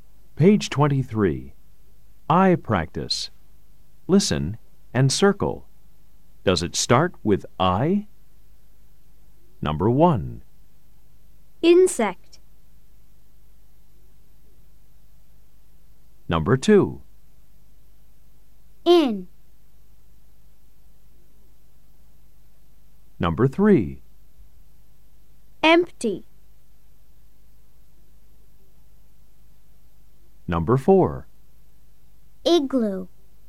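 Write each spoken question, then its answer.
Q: Does it start with I? Number 1. Insect.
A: Yes

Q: Number 2. In.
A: Yes

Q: Number 3. Empty.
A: No

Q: Number 4. Igloo.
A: Yes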